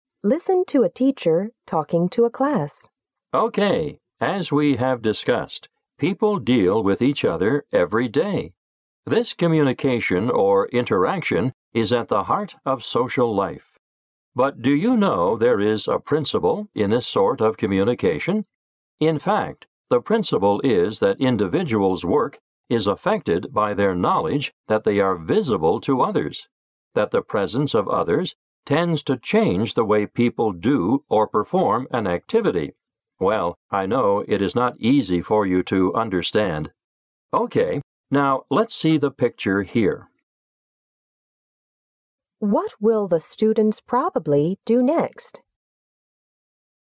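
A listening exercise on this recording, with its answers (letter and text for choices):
What will the students probably do next?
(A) Discuss the communication between people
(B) Read something about the communication between people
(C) Ask any question they have about their communication issues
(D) Look at an illustration explaining the communication principle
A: (D) Look at an illustration explaining the communication principle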